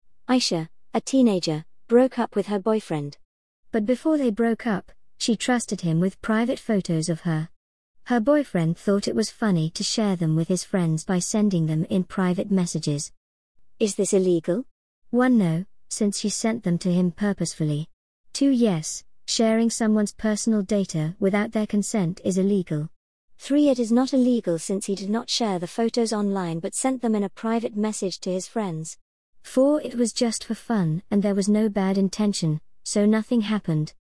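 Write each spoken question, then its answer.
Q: Is this illegal?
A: 2: Yes, sharing someone's personal data without their consent is illegal.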